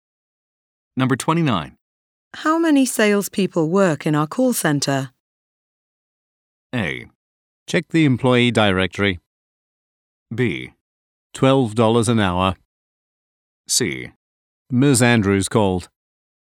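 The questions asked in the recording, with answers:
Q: How many salespeople work in our call center?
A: A: Check the employee directory.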